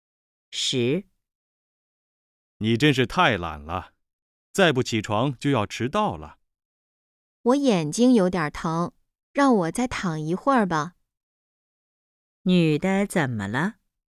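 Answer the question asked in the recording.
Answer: 眼睛有点疼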